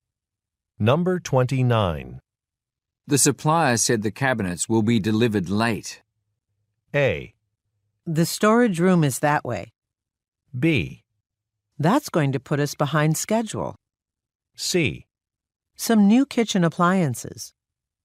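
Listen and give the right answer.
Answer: B: That's going to put us behind schedule.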